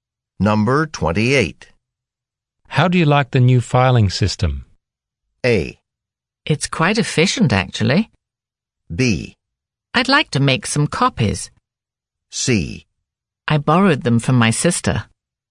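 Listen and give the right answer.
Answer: A: It's quite efficient, actually.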